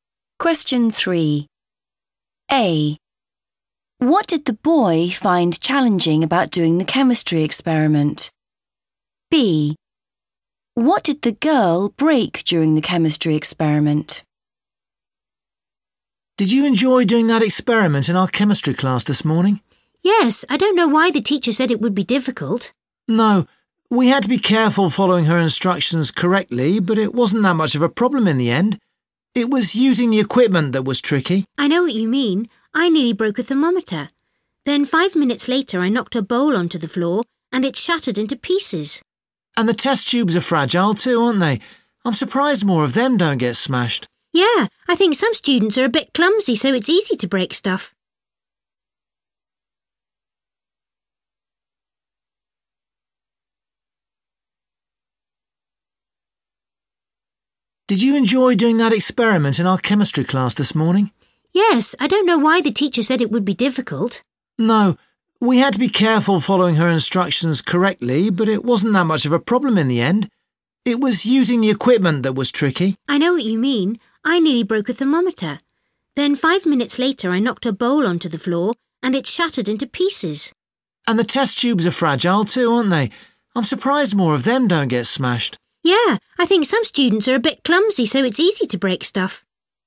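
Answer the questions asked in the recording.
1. using the equipment
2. a bowl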